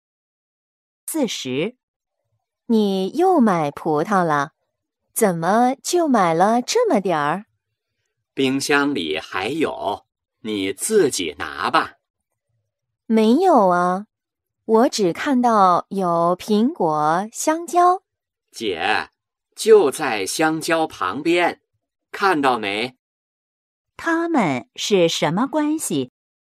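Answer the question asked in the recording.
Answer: 姐弟(或姐妹)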